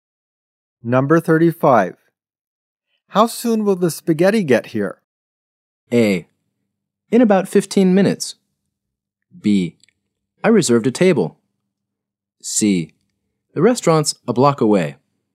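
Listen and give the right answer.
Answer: A: In about 15 minutes.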